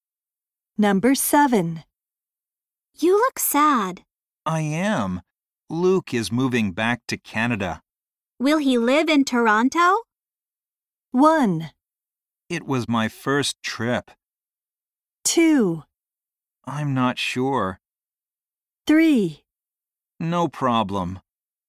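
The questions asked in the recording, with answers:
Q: Will he live in Toronto?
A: 2: I'm not sure.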